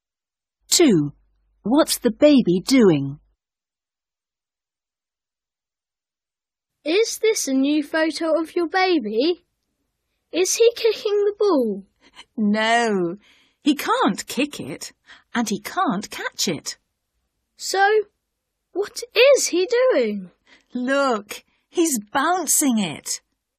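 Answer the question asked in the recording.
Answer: Bouncing the ball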